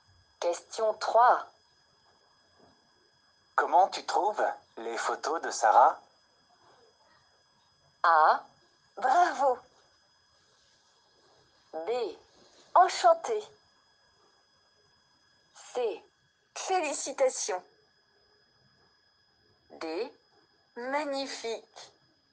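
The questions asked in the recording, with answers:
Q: Comment tu trouves les photos de Sarah?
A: D: Magnifique.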